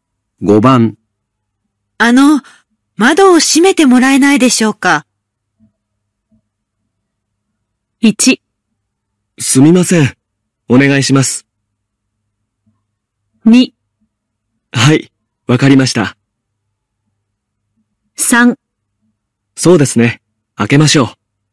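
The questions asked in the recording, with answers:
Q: あの、窓を閉めてもらえないでしょうか。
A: 2: はい、わかりました。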